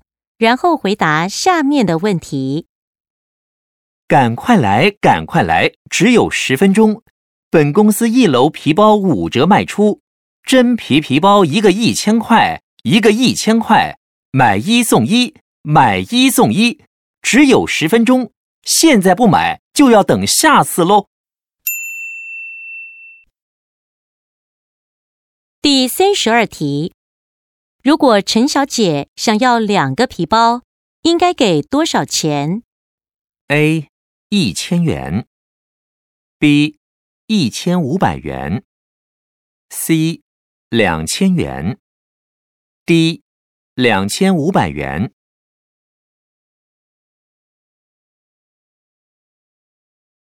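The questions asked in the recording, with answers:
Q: 如果陈小姐想要2个皮包,应该给多少钱?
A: A: 1000元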